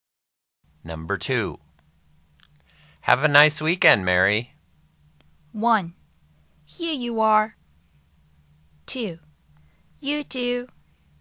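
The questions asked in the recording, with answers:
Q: Have a nice weekend, Mary.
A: 2: You too.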